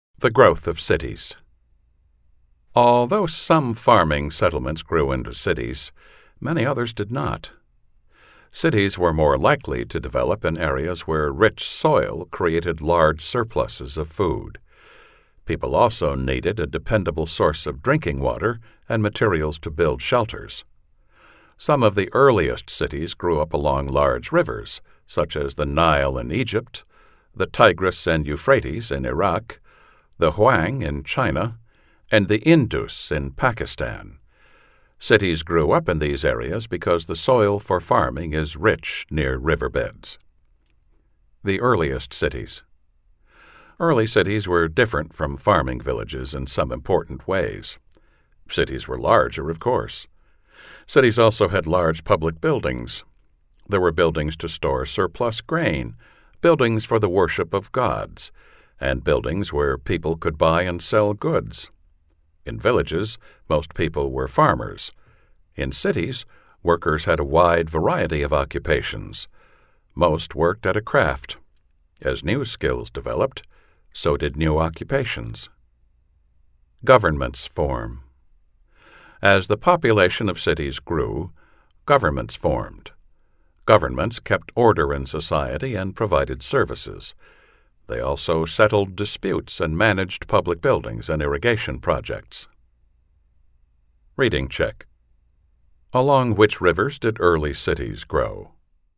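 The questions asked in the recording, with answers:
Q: Along which rivers did early cities grow?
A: The Nile, the Tigris and Euphrates, the Huang, and the Indus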